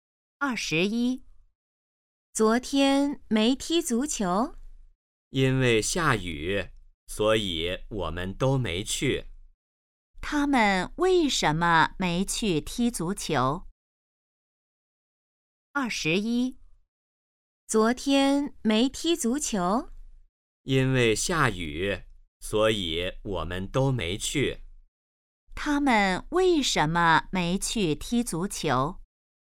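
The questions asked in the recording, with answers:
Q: 他们为什么没去踢足球?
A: 因为下雨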